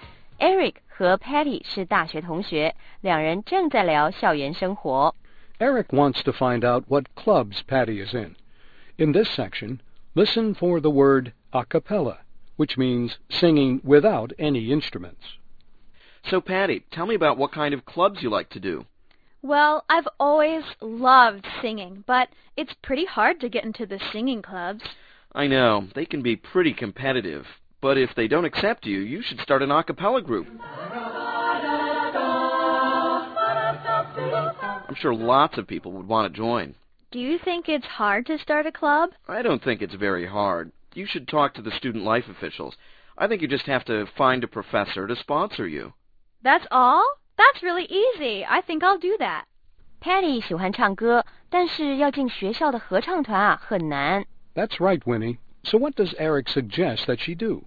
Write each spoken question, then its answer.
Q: So what does Eric suggest that she do?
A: Eric 建议他自己组织一个 a cappella club, 也就是不用乐器伴奏,全靠清唱的阿卡贝拉合唱团。